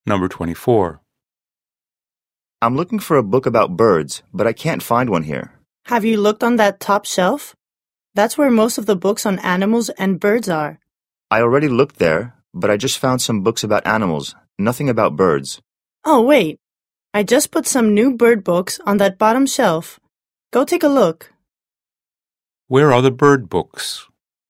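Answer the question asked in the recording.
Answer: On the bottom shelf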